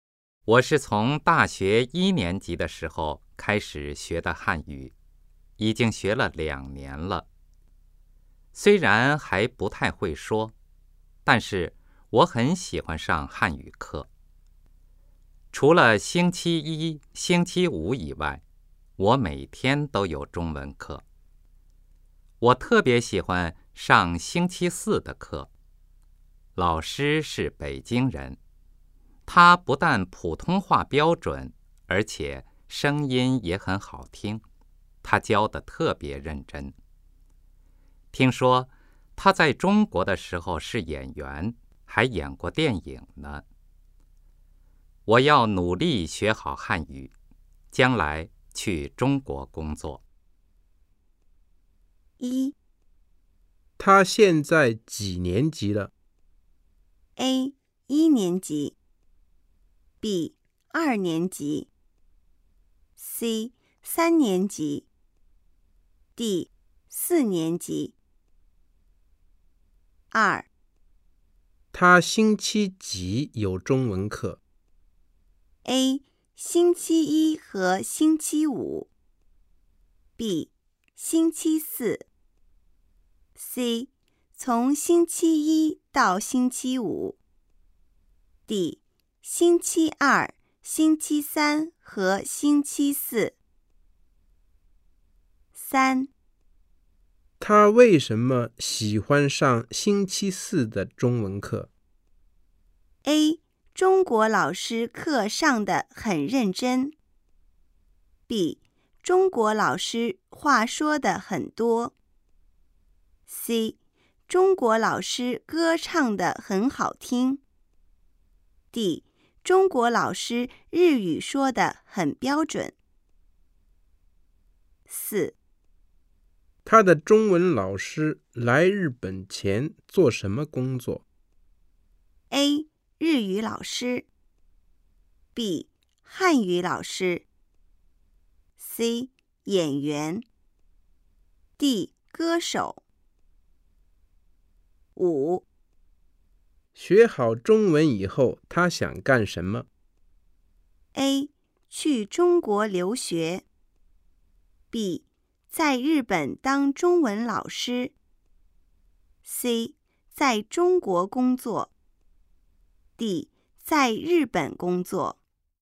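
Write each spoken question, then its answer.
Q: 他星期几有中文课?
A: D: 星期二、星期三和星期四

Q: 他为什么喜欢上星期四的中文课?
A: A: 中国老师课上得很认真

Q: 他的中文老师来日本前做什么工作?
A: C: 演员

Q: 学好中文以后他想干什么?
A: C: 在中国工作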